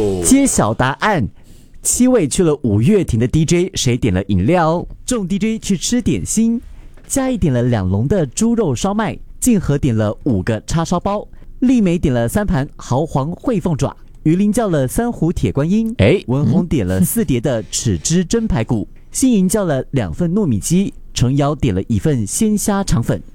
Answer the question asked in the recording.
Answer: 鱼鳞, 他叫了铁观音。